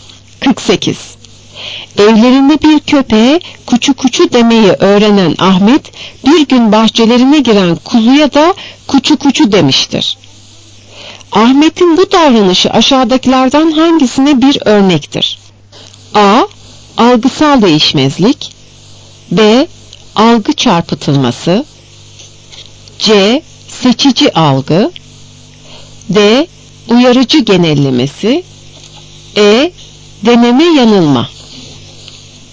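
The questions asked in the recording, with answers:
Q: Ahmet'in bu davranışı aşağıdakilerden hangisine bir örnektir?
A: D: Uyarıcı genellemesi.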